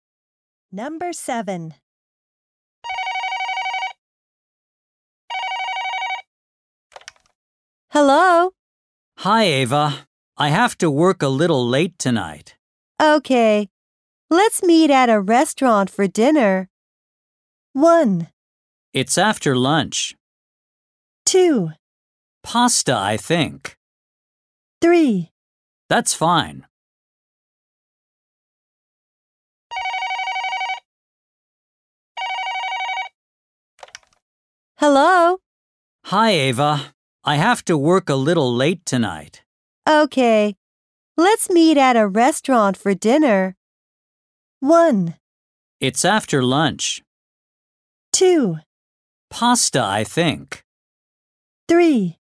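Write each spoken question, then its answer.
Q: Okay. Let's meet at a restaurant for dinner.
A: 3: That's fine.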